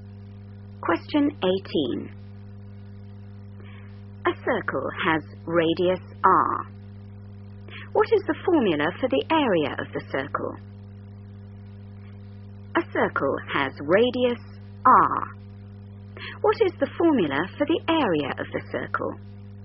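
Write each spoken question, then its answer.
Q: What is the formula for the area of the circle?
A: A = πR2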